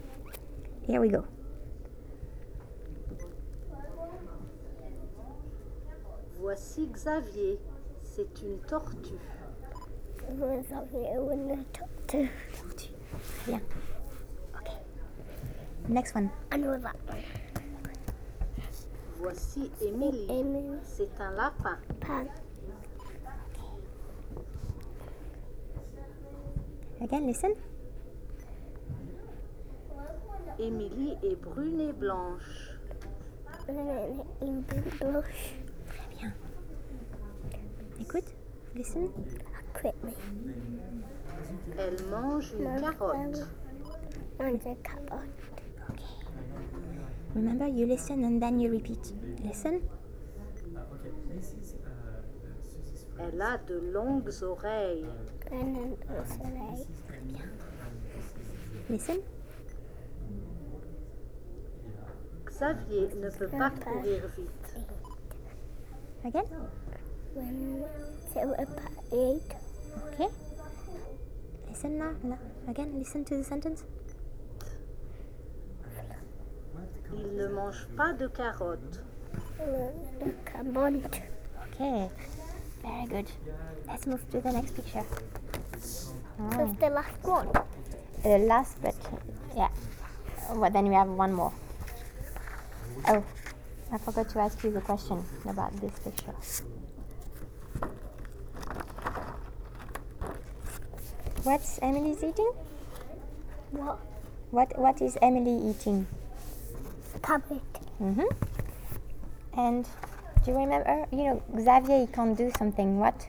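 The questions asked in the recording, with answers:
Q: What is Emily eating?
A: A carrot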